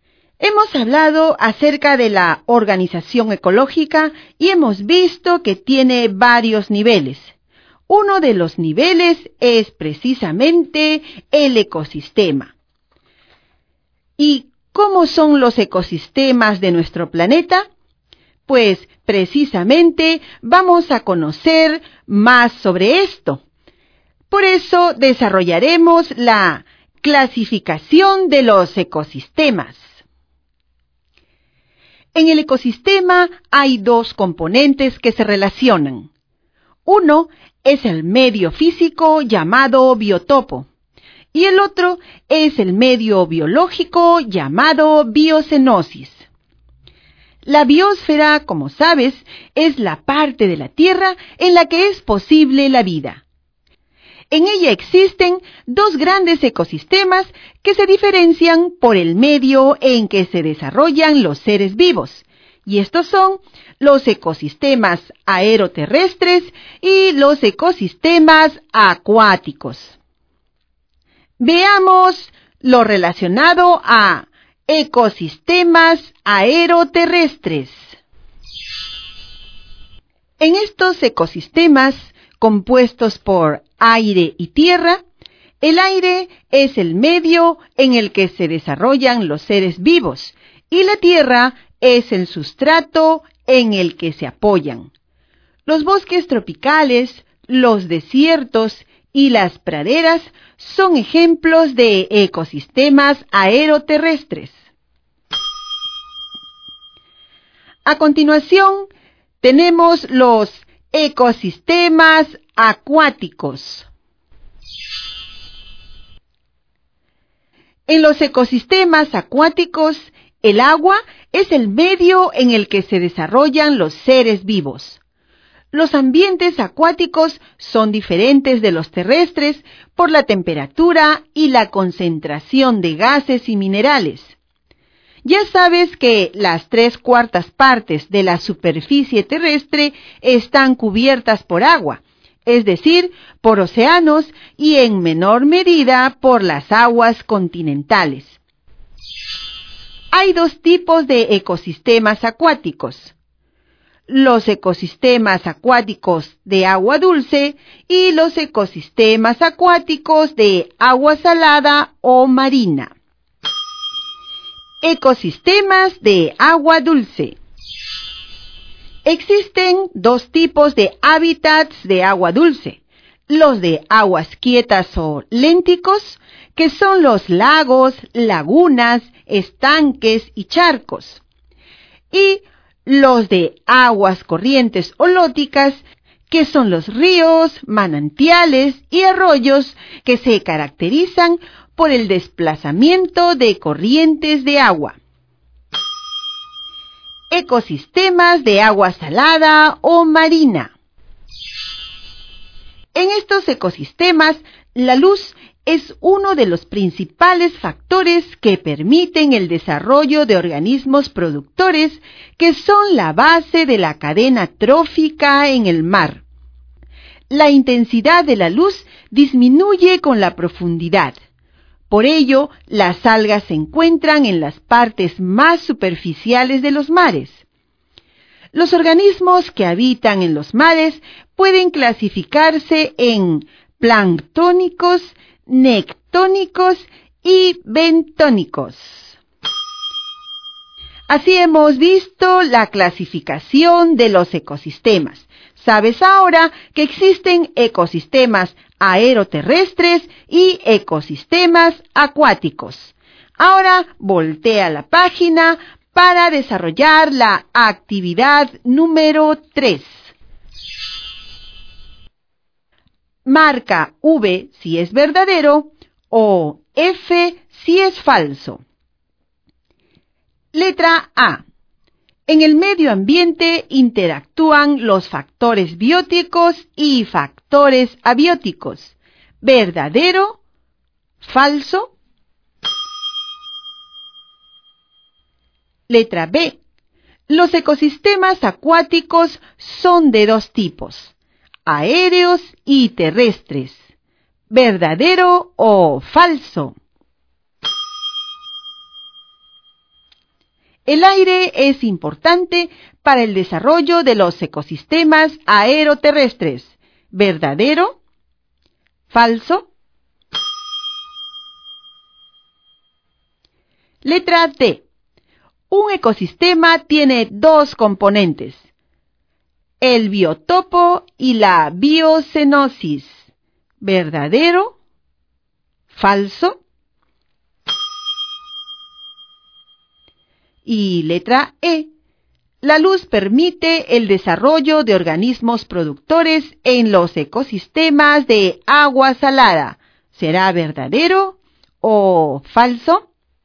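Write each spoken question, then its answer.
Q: Letra B. Los ecosistemas acuáticos son de dos tipos, aéreos y terrestres.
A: Falso

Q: El aire es importante para el desarrollo de los ecosistemas aeroterrestres.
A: Verdadero

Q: Letra D. Un ecosistema tiene dos componentes, el biotopo y la biocenosis.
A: Verdadero

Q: Y letra E. La luz permite el desarrollo de organismos productores en los ecosistemas de agua salada.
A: Verdadero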